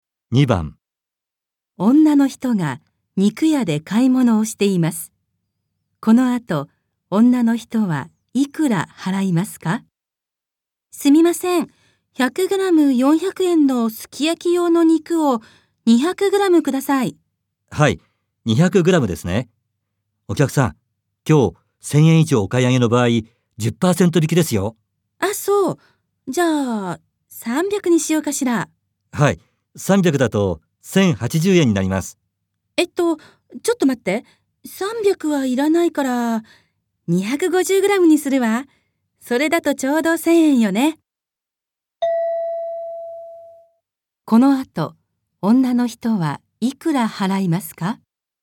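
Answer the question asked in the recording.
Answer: 900円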